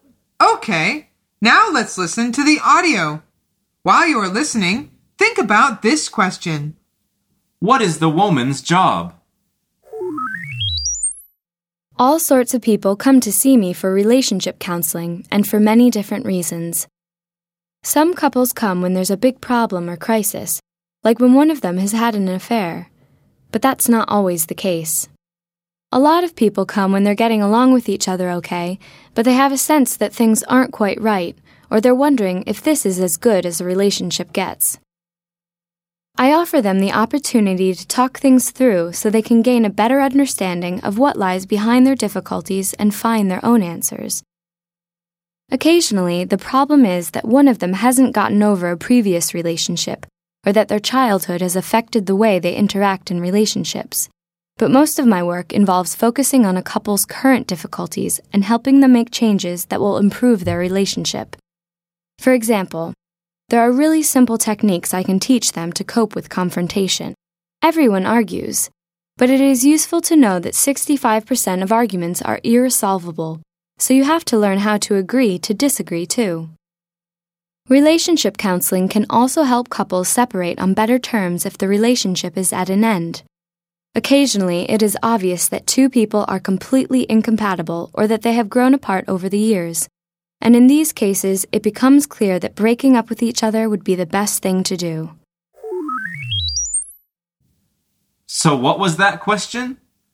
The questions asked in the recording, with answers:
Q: What is the woman's job?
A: The answer is she's a relationship counselor.